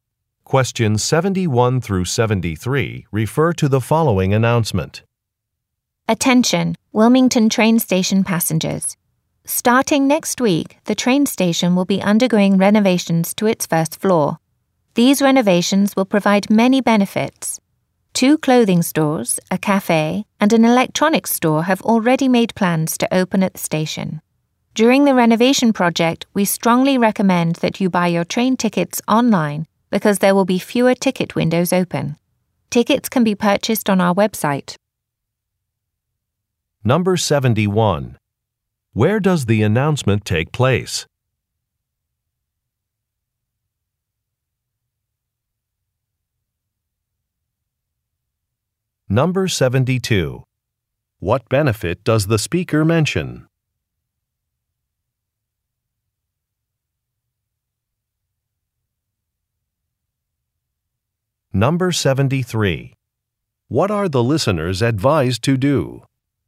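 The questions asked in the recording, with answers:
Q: Where does the announcement take place?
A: At a train station

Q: What benefit does the speaker mention?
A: New stores and a cafe will open

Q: What are the listeners advised to do?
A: Buy tickets online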